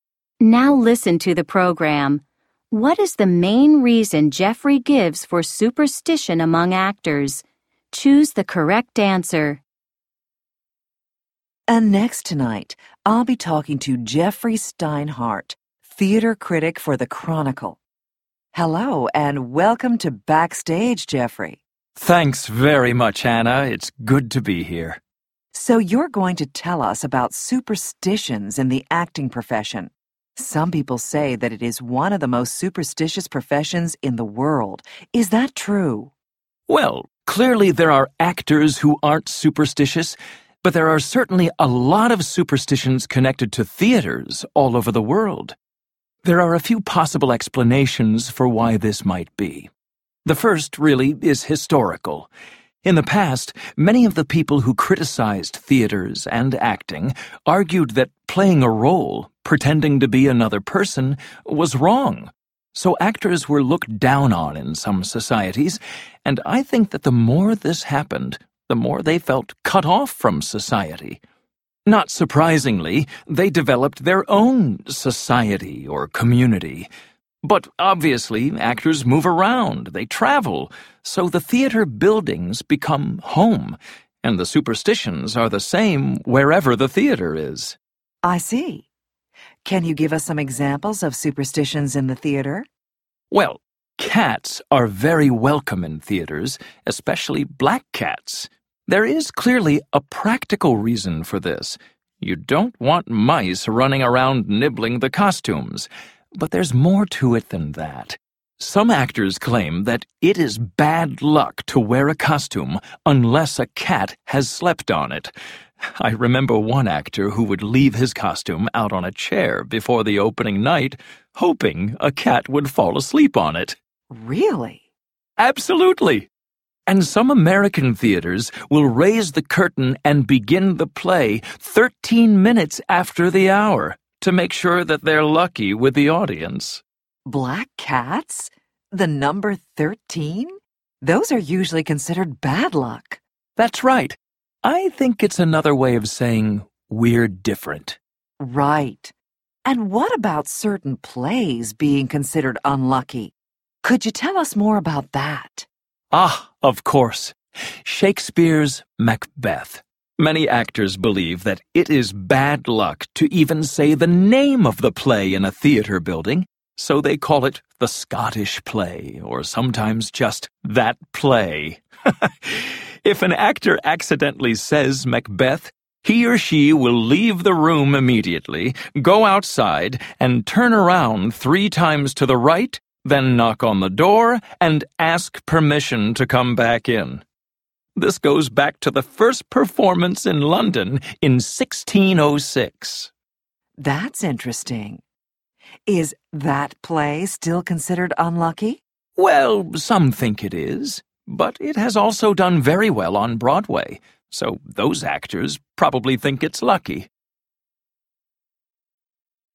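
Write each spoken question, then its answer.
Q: What is the main reason Jeffrey gives for superstition among actors?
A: Historical: actors were looked down on and felt cut off from society, so they formed their own community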